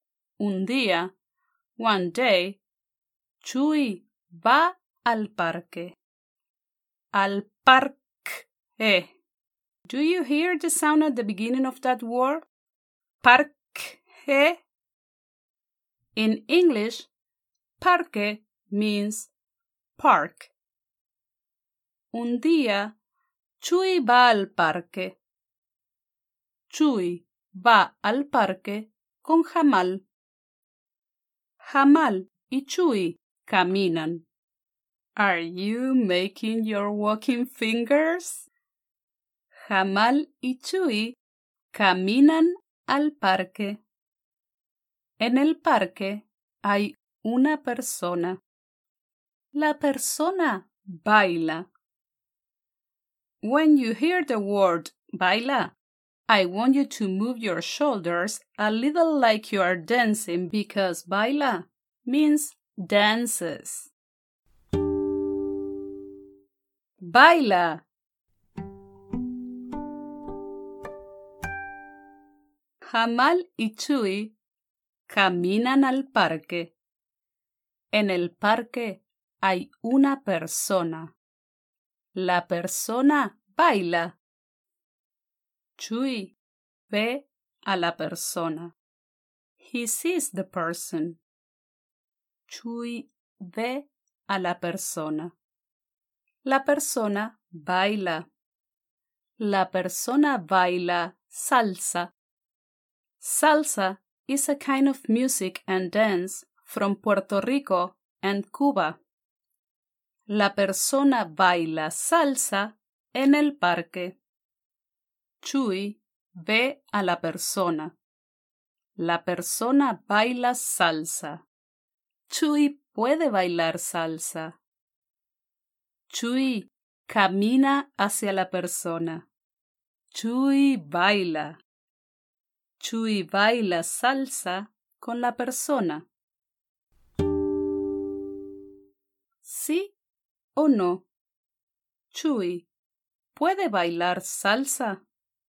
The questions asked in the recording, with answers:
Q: ¿Sí o no? Chuy, ¿puede bailar salsa?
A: Sí. Chuy puede bailar salsa.